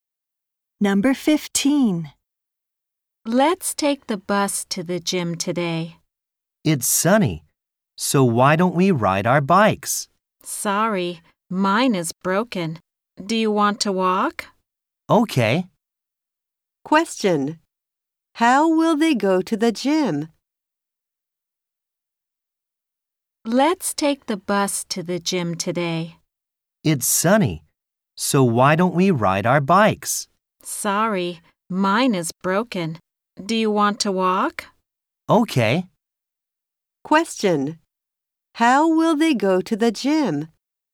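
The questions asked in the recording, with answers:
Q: How will they go to the gym?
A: They will walk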